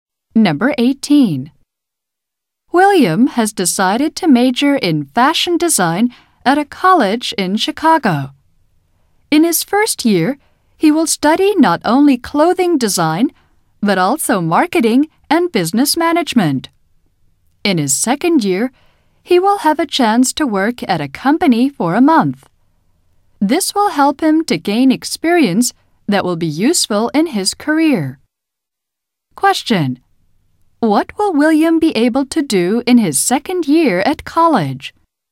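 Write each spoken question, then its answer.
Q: What will William be able to do in his second year at college?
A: Work at a company for a month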